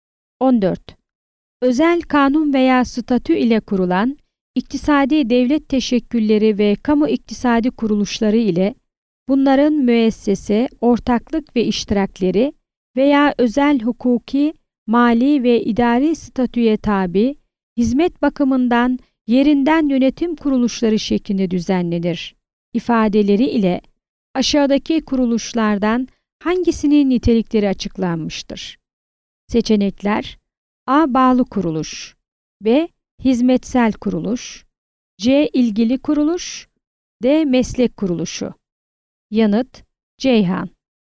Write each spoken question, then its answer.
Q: Özel kanun veya statü ile kurulan iktisadi devlet teşekkülleri ve kamu iktisadi kuruluşları ile bunların müessese, ortaklık ve iştirakleri veya özel hukuki, mali ve idari statüye tabi hizmet bakımından yerinden yönetim kuruluşları şeklinde düzenlenir ifadeleri ile aşağıdaki kuruluşlardan hangisinin nitelikleri açıklanmıştır?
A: Yanıt: Ceyhan.